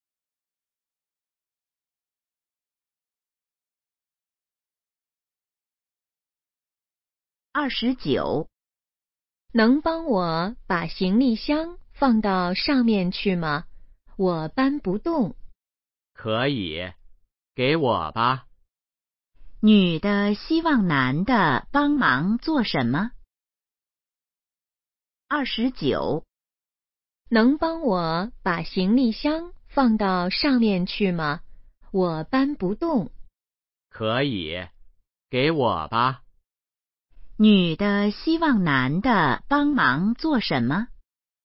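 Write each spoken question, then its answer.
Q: 女的希望男的帮忙做什么?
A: 把行李箱放到上面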